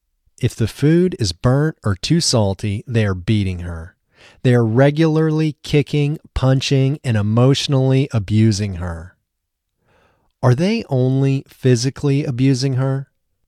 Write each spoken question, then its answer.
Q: Are they only physically abusing her?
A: No, they aren't only physically abusing her, they are emotionally abusing her, too.